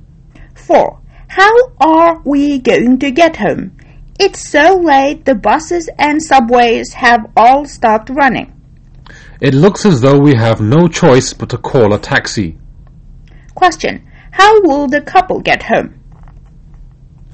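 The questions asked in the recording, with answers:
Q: How will the couple get home?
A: By taxi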